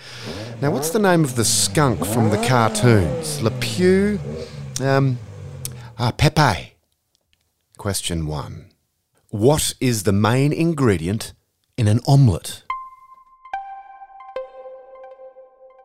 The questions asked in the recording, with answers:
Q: What is the main ingredient in an omelette?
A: Eggs, and lots of them.